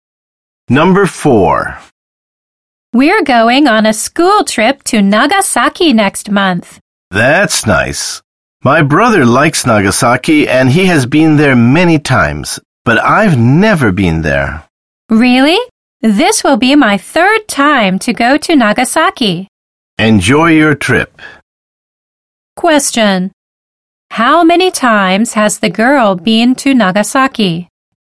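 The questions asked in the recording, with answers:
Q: How many times has the girl been to Nagasaki?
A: Twice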